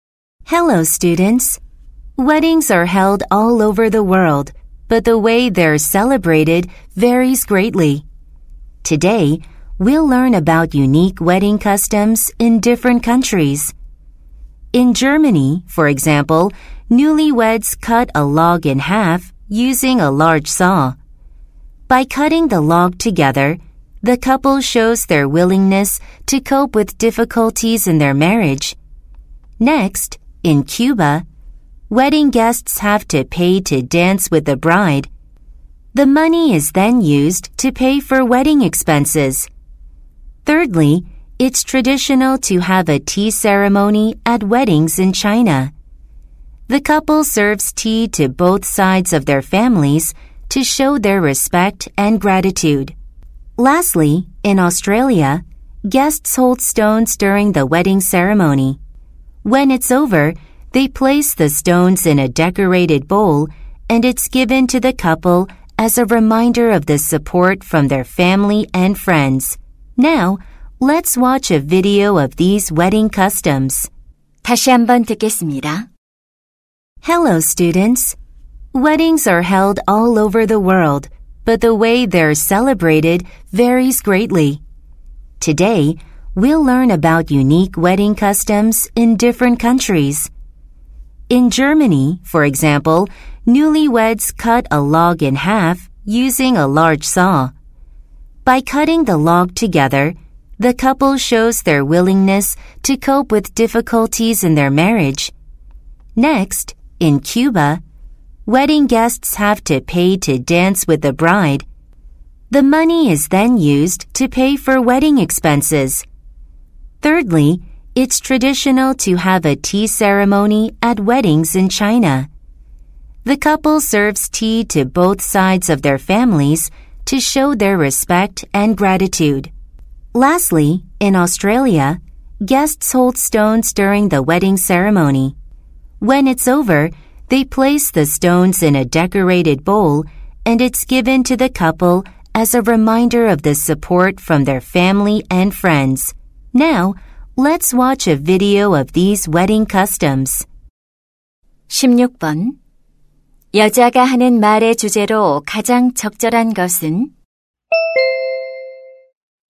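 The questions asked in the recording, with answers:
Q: 여자가 하는 말의 주제로 가장 적절한 것은?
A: 여러 나라의 독특한 결혼 풍습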